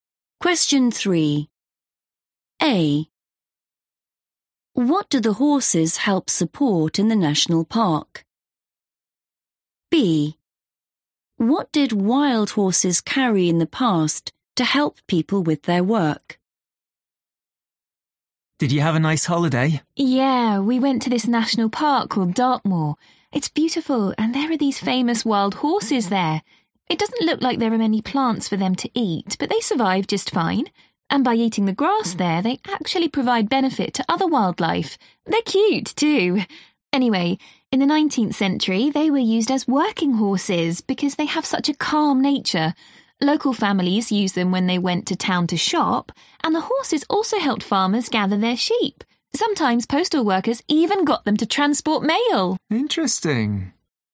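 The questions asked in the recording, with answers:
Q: What do the horses help support in the national park?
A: other wildlife

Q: What did wild horses carry in the past to help people with their work?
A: mail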